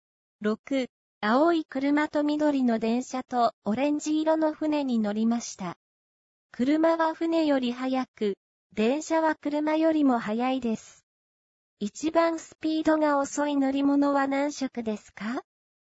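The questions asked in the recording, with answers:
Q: 一番スピードが遅い乗り物は何色ですか?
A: オレンジ色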